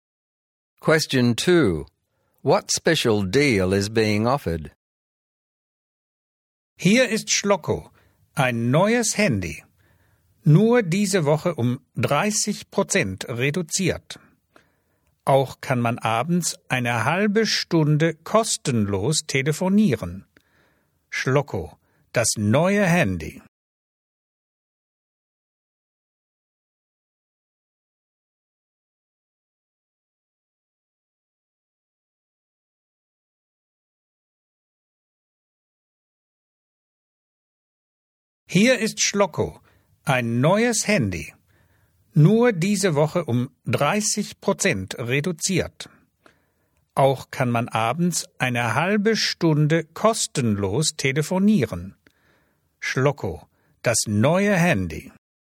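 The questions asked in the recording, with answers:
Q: What special deal is being offered?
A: The new mobile phone is 30% off this week only, and half an hour of calls in the evening is free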